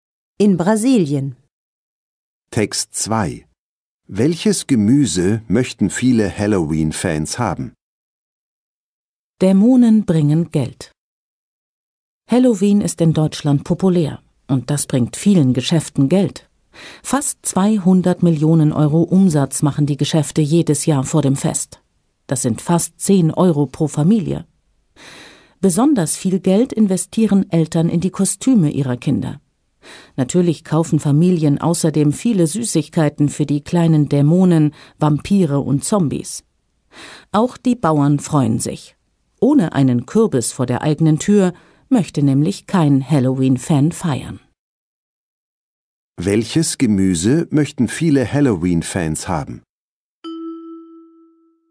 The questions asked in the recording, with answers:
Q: Welches Gemüse möchten viele Halloween-Fans haben?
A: Sie möchten einen Kürbis haben.